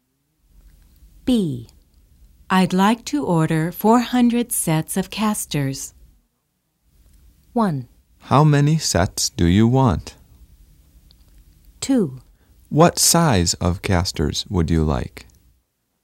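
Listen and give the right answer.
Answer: 2: What size of casters would you like?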